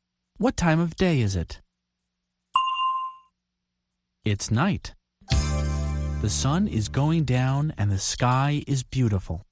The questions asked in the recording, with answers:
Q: What time of day is it?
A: It's night.